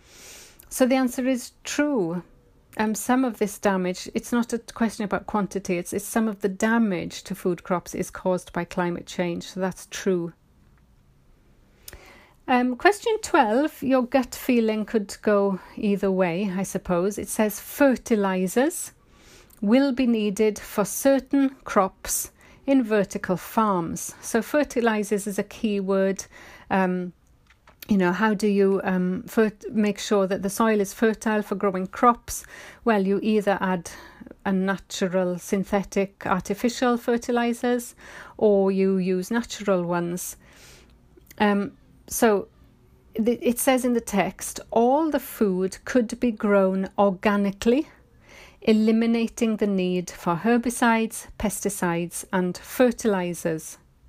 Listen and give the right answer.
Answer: Therefore, the answer is false.